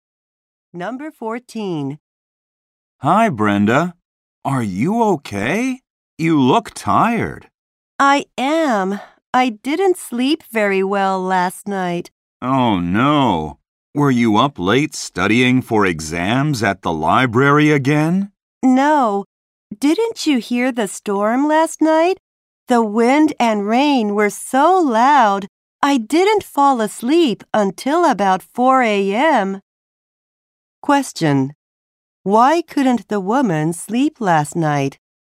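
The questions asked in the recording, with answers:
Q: Why couldn't the woman sleep last night?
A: The storm was too loud.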